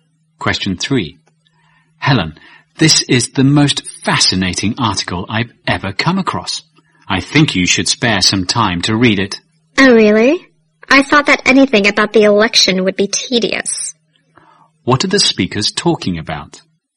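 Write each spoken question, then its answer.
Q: What are the speakers talking about?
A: A fascinating article about the election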